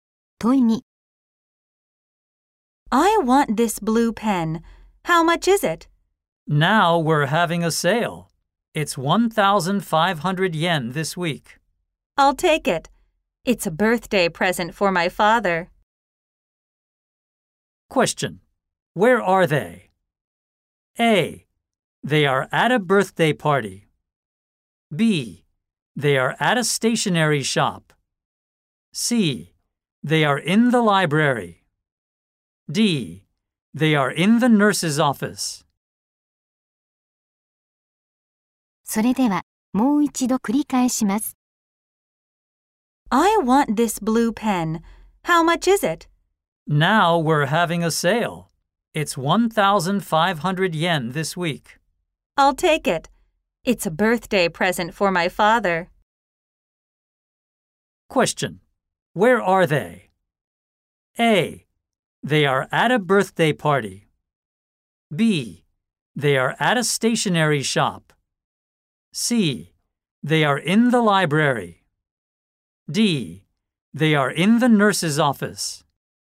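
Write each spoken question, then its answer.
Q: Where are they?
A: B: They are at a stationery shop.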